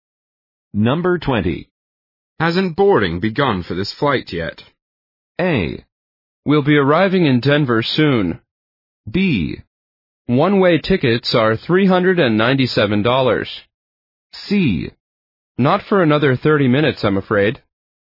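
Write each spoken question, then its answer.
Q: Hasn't boarding begun for this flight yet?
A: C: Not for another 30 minutes, I'm afraid.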